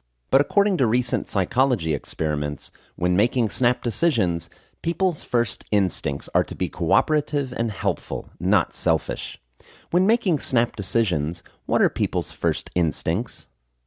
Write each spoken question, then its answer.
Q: When making snap decisions, what are people's first instincts?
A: When making snap decisions, people's first instincts are to be cooperative and helpful, not selfish.